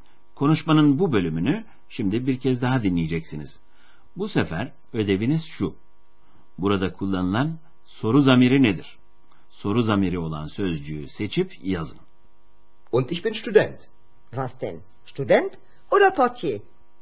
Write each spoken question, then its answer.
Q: Bu sefer ödeviniz şu. Burada kullanılan soru zamiri nedir?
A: Almancası was.